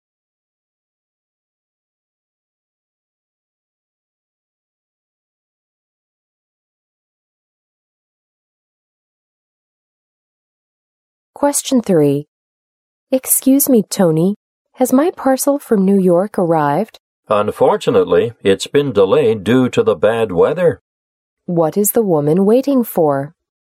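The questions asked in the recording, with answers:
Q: What is the woman waiting for?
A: A parcel from New York.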